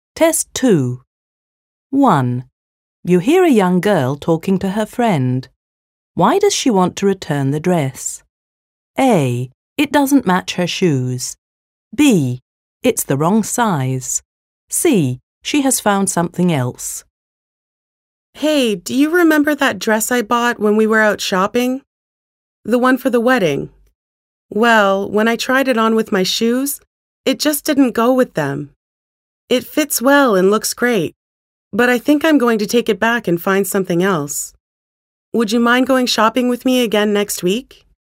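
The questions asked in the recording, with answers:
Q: Why does she want to return the dress?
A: A: It doesn't match her shoes.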